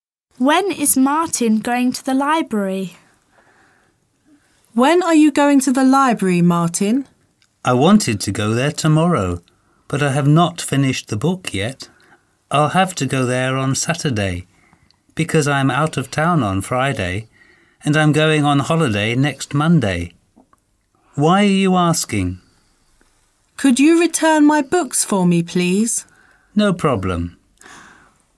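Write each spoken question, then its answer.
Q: When is Martin going to the library?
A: On Saturday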